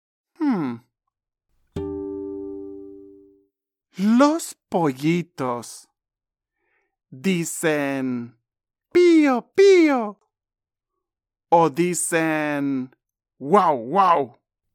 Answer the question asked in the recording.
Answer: Sí, tienes razón. Los pollitos no dicen wow, wow.